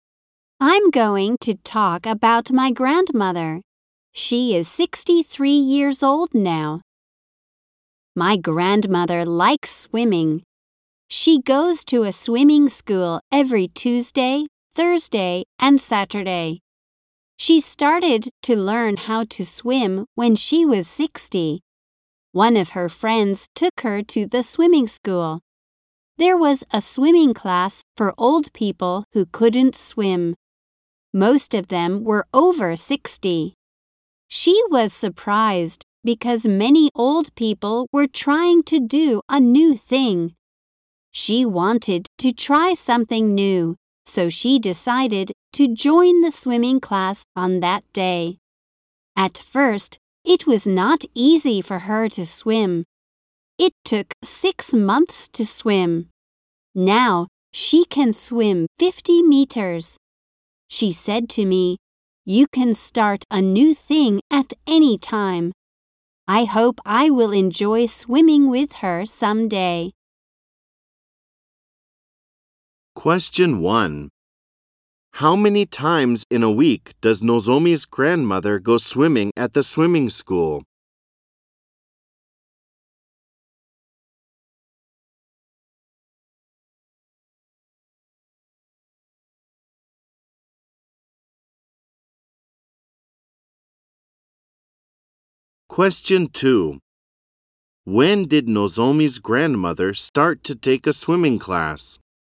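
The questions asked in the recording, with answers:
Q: How many times in a week does Nozomi's grandmother go swimming at the swimming school?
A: Three times

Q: When did Nozomi's grandmother start to take a swimming class?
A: When she was 60 (on the day her friend took her to the swimming school)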